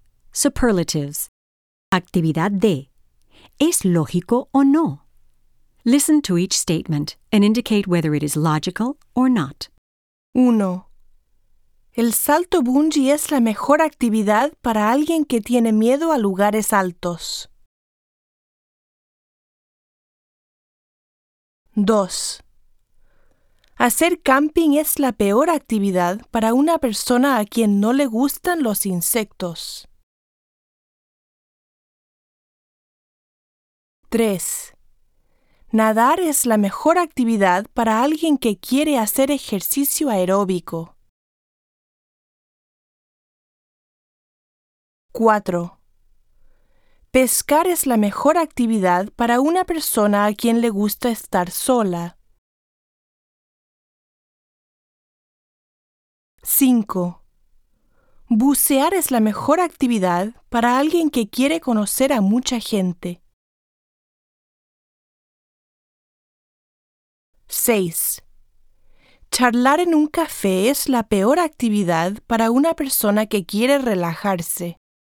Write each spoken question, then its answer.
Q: El salto bungee es la mejor actividad para alguien que tiene miedo a lugares altos.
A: Ilógico.

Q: Hacer camping es la peor actividad para una persona a quien no le gustan los insectos.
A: Lógico.

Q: Nadar es la mejor actividad para alguien que quiere hacer ejercicio aeróbico.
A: Lógico.

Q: Pescar es la mejor actividad para una persona a quien le gusta estar sola.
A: Lógico.

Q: Bucear es la mejor actividad para alguien que quiere conocer a mucha gente.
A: Ilógico.

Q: Charlar en un café es la peor actividad para una persona que quiere relajarse.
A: Ilógico.